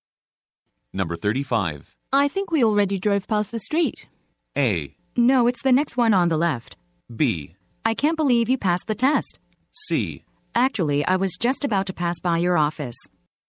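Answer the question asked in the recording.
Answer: A: No, it's the next one on the left.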